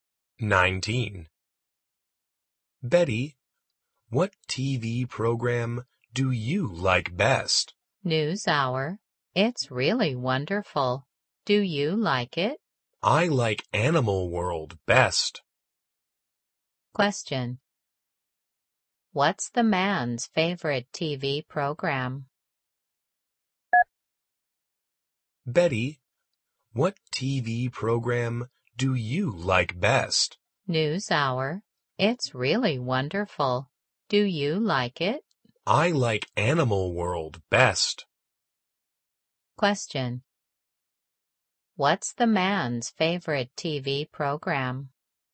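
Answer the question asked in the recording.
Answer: Animal World.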